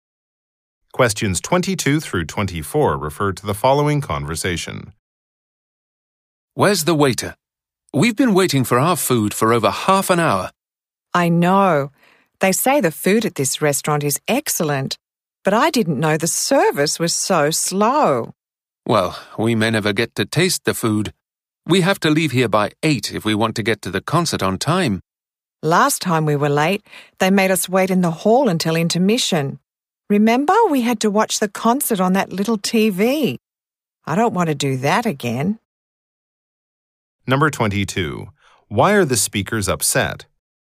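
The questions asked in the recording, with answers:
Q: Why are the speakers upset?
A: The service is slow; their food hasn't come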